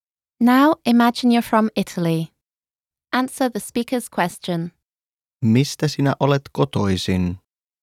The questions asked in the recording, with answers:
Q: Mistä sinä olet kotoisin?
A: Olen kotoisin Italiasta.